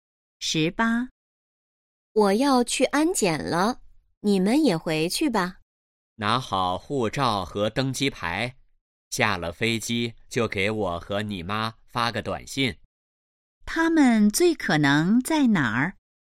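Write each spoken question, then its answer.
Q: 他们最可能在哪儿?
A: 机场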